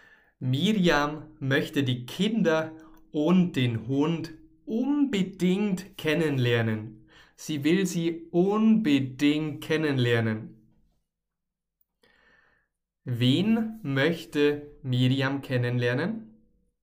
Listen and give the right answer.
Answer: Die Kinder und den Hund. Sie möchte die Kinder und den Hund unbedingt kennenlernen.